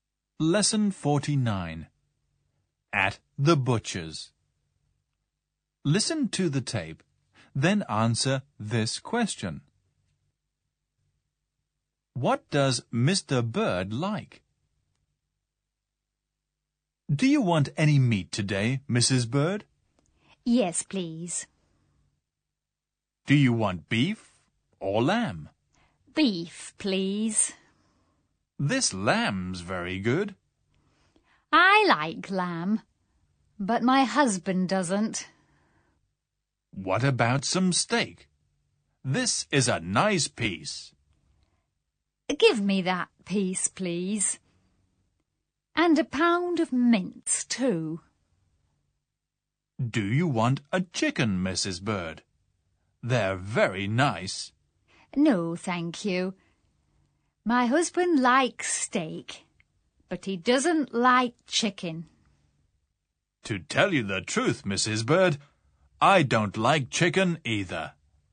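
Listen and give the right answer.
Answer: Steak (and beef)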